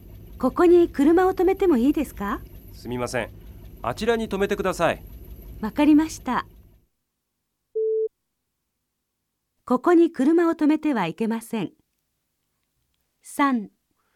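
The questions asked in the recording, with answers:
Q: ここに車を止めてはいけません。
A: 正しい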